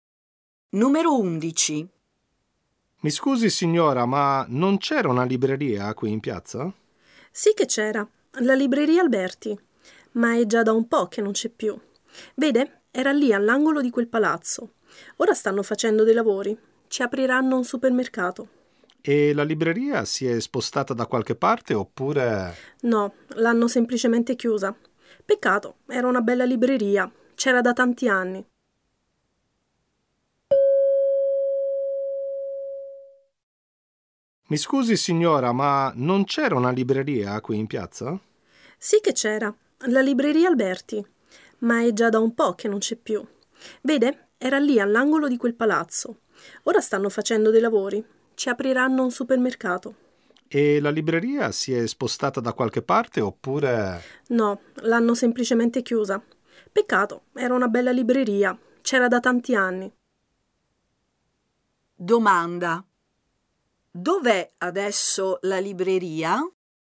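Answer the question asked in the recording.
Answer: Non c'è più, l'hanno chiusa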